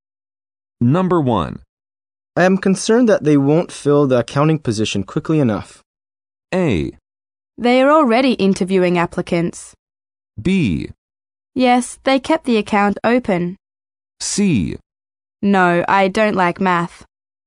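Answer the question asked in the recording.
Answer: A: They are already interviewing applicants.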